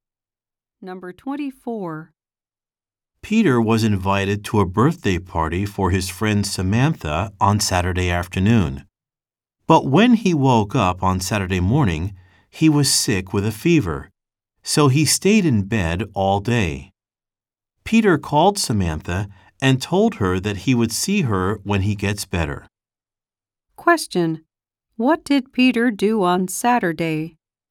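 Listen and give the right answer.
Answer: He stayed in bed all day because he was sick.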